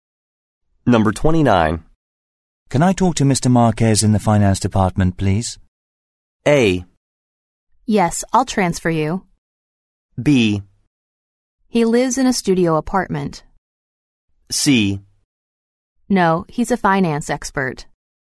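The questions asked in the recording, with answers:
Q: Can I talk to Mr. Marquez in the finance department, please?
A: A: Yes, I'll transfer you.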